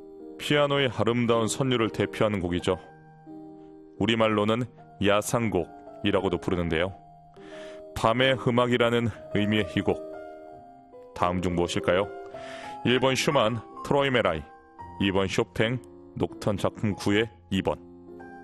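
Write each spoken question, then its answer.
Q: 밤의 음악이라는 의미의 이 곡. 다음 중 무엇일까요?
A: 2번: 쇼팽, 녹턴 작품 9의 2번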